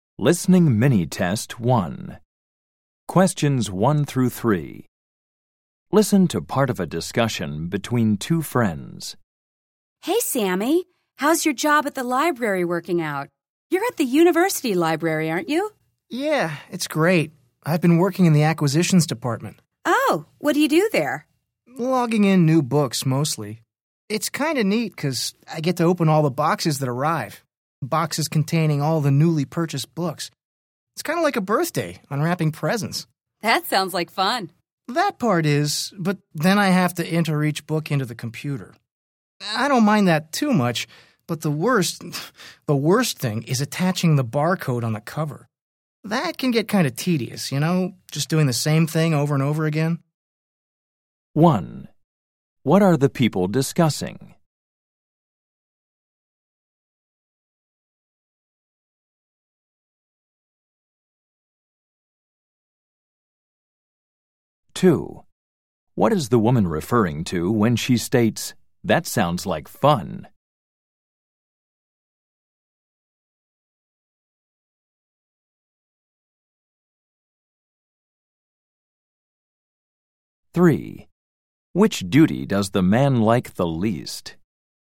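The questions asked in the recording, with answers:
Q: What are the people discussing?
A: The man's job in the university library's acquisitions department

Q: What is the woman referring to when she states, "That sounds like fun"?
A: Opening the boxes of newly purchased books

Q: Which duty does the man like the least?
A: Attaching the barcode to the cover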